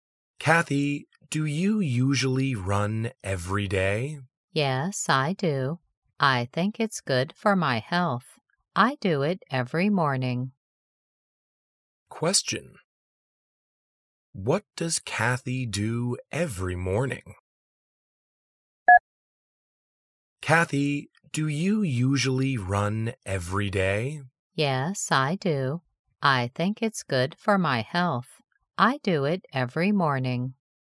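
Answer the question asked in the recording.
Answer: She runs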